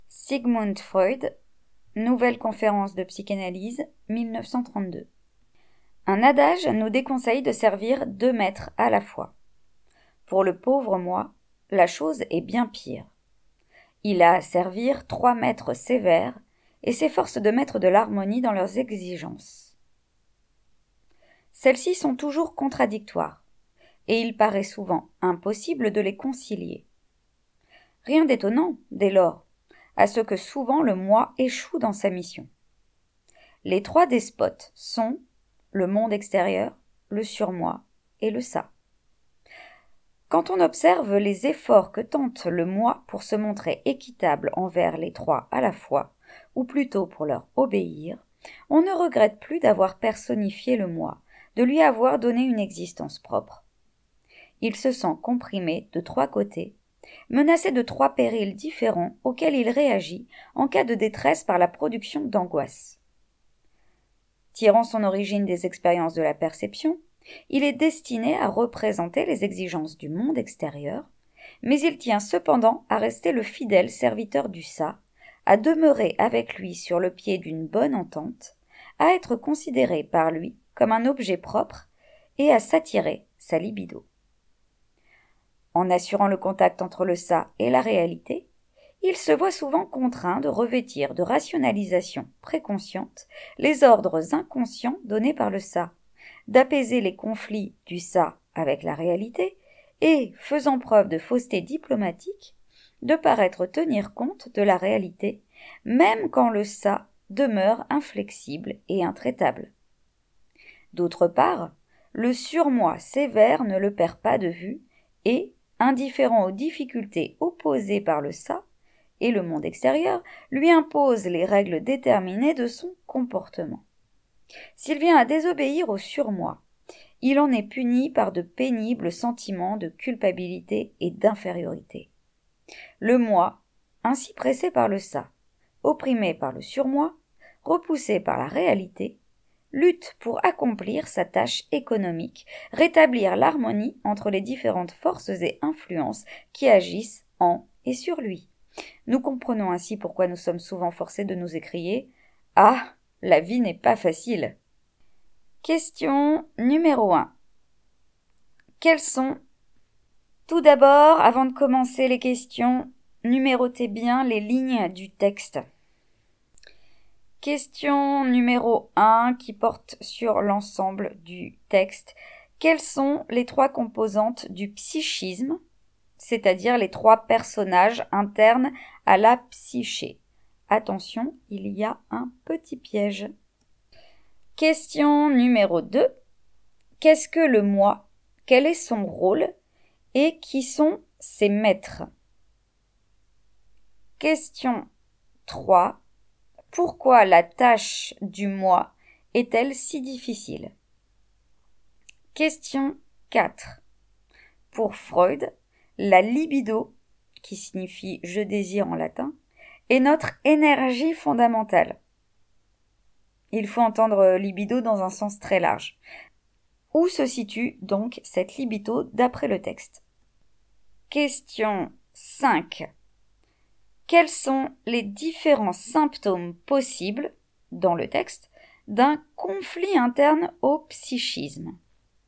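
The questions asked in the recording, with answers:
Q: Quelles sont les trois composantes du psychisme, c'est-à-dire les trois personnages internes à la psyché?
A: Le moi, le surmoi et le ça (le monde extérieur n'en fait pas partie)

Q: Quel est son rôle? Et qui sont ses maîtres?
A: Harmoniser les exigences contradictoires de ses maîtres : le monde extérieur, le surmoi et le ça

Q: Pourquoi la tâche du moi est-elle si difficile?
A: Il doit servir trois maîtres sévères dont les exigences sont contradictoires et souvent inconciliables

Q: Où se situe donc cette libido d'après le texte?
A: Dans le ça

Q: Quels sont les différents symptômes possibles, dans le texte, d'un conflit interne au psychisme ?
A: L'angoisse et des sentiments pénibles de culpabilité et d'infériorité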